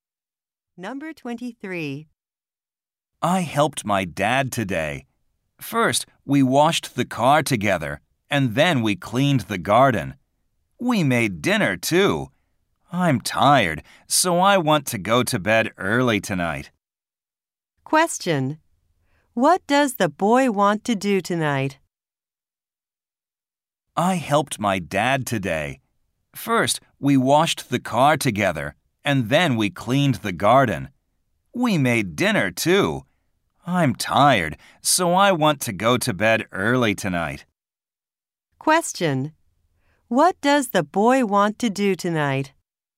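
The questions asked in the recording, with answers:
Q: What does the boy want to do tonight?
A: Go to bed early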